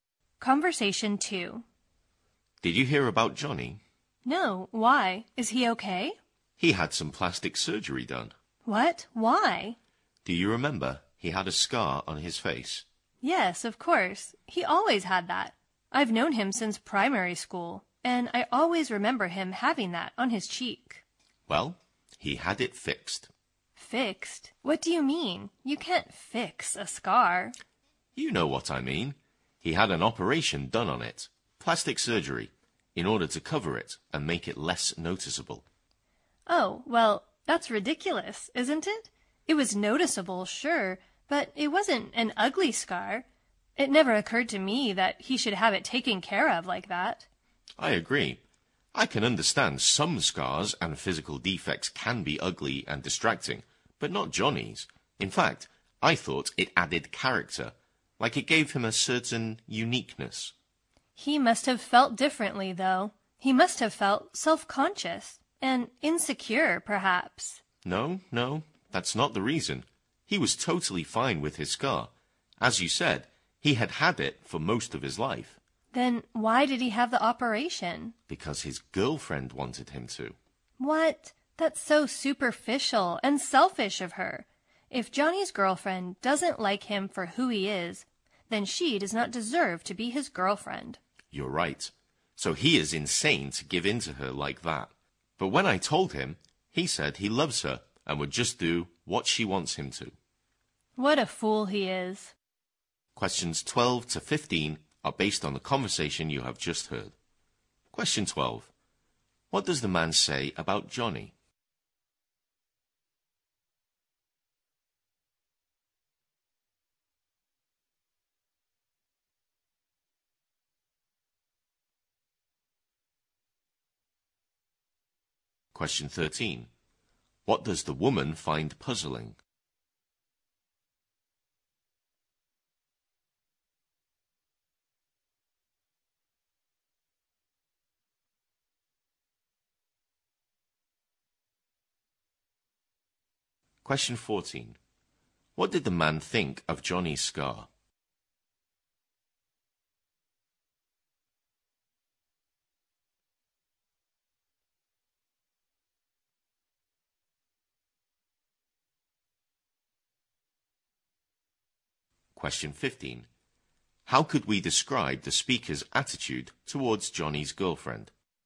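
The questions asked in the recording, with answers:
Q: What does the man say about Johnny?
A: He had plastic surgery on the scar on his face.

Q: What did the man think of Johnny's scar?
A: It gave him character and made him unique.

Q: How could we describe the speaker's attitude towards Johnny's girlfriend?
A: Critical: they think she is superficial and selfish.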